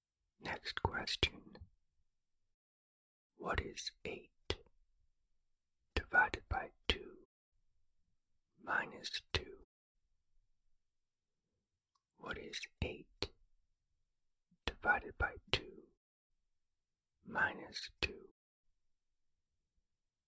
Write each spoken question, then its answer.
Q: What is 8 divided by 2 minus 2?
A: The answer is 2.